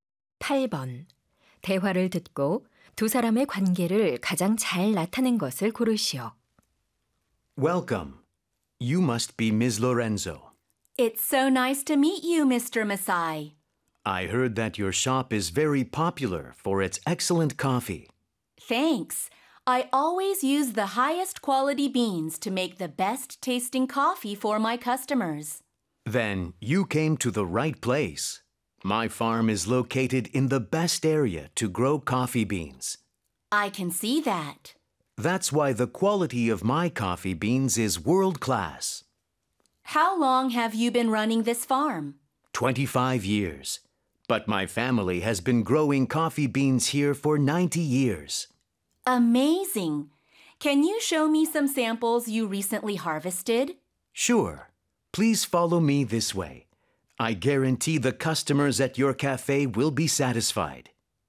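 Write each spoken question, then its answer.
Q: 대화를 듣고 두 사람의 관계를 가장 잘 나타낸 것을 고르시오.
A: 카페 주인 - 커피 농장 주인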